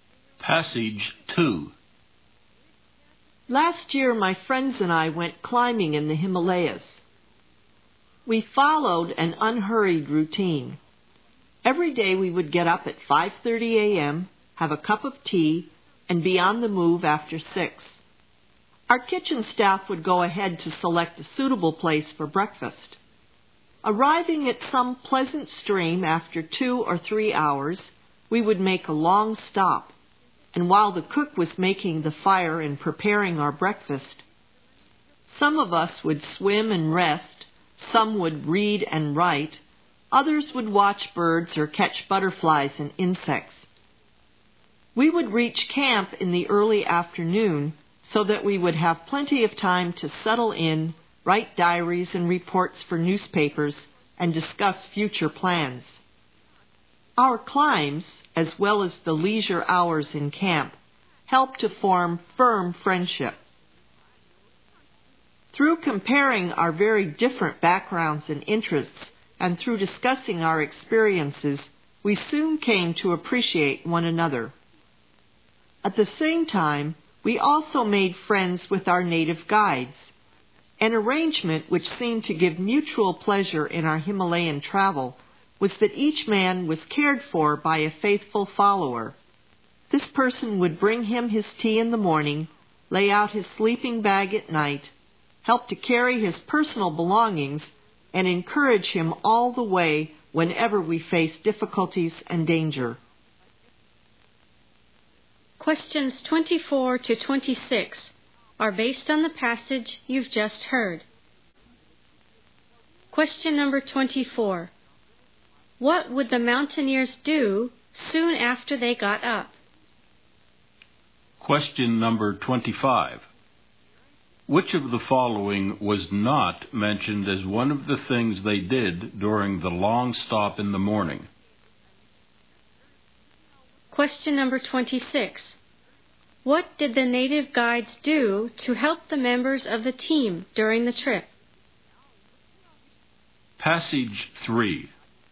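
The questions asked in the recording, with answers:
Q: What would the mountaineers do soon after they got up?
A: Have a cup of tea

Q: What did the native guides do to help the members of the team during the trip?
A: Brought tea, laid out sleeping bags, carried belongings and encouraged them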